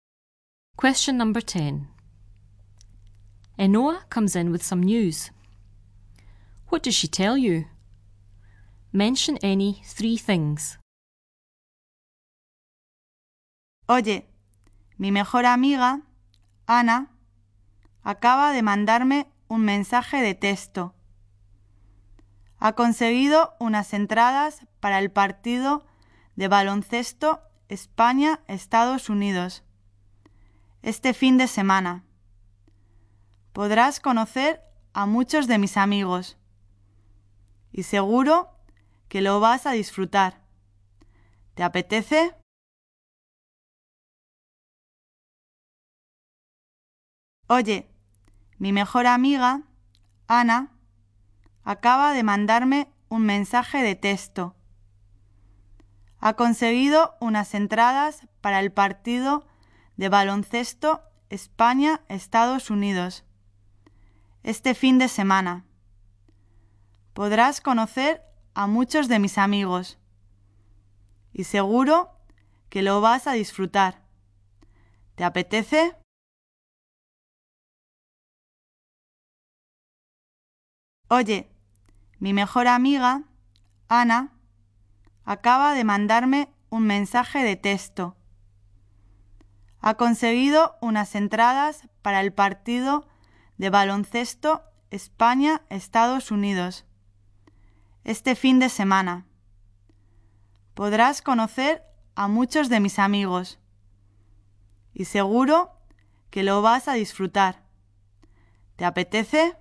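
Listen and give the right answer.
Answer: Her best friend Ana texted her; she has tickets for the Spain v USA basketball match this weekend; you can meet many of her friends and you'll enjoy it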